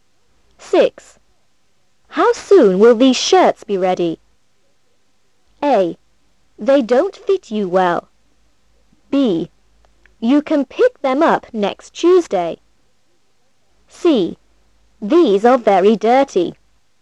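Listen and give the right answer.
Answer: B: You can pick them up next Tuesday.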